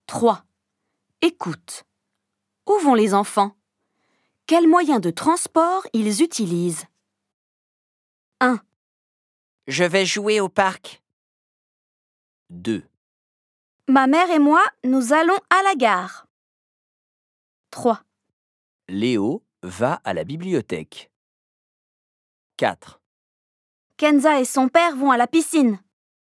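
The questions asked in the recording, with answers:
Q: Où vont les enfants?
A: au parc

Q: Où vont les enfants?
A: à la gare

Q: Où vont les enfants?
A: à la bibliothèque

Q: Où vont les enfants?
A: à la piscine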